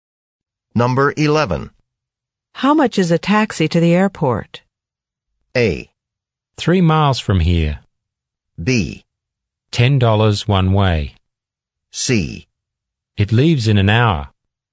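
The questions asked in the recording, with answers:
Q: How much is a taxi to the airport?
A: B: $10 one way.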